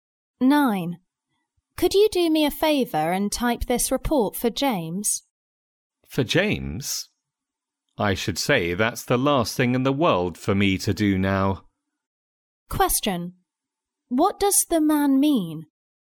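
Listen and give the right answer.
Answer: He doesn't want to type the report for James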